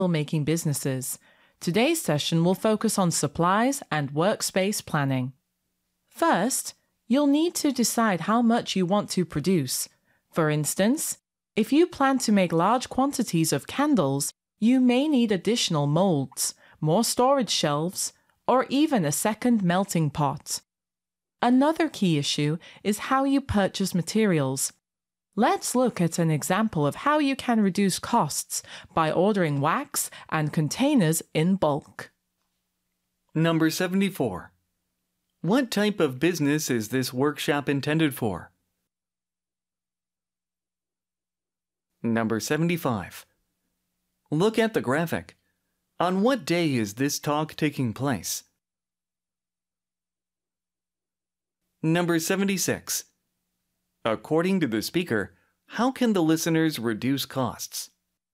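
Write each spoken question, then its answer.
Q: What type of business is this workshop intended for?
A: Candle-making businesses

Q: According to the speaker, how can the listeners reduce costs?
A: By ordering wax and containers in bulk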